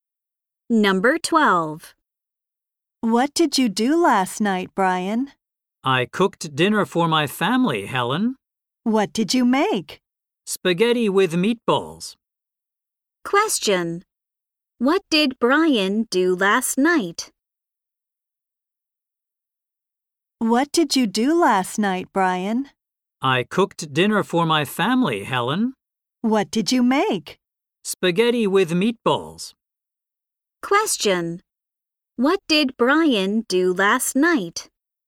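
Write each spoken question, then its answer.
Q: What did Brian do last night?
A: He cooked dinner for his family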